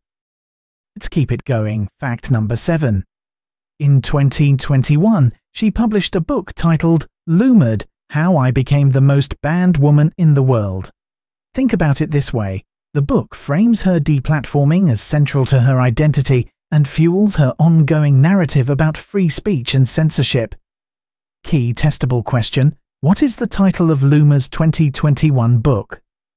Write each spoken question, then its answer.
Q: What is the title of Loomer's 2021 book?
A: Correct answer, Loomered, How I Became the Most Banned Woman in the World.